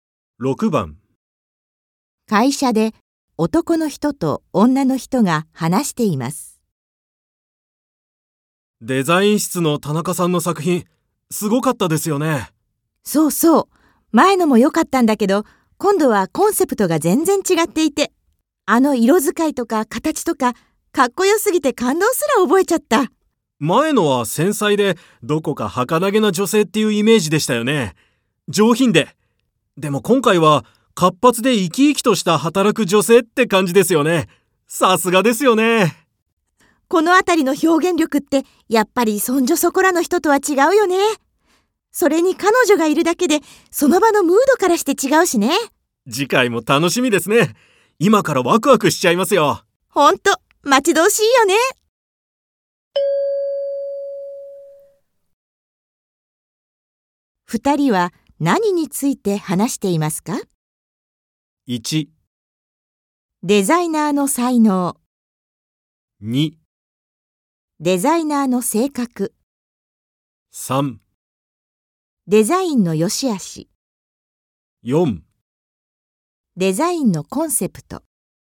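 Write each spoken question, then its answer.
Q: 二人は何について話していますか?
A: 1: デザイナーの才能。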